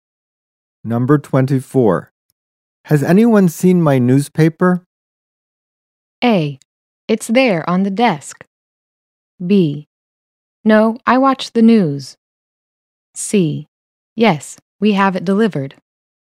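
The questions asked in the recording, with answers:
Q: Has anyone seen my newspaper?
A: A: It's there on the desk.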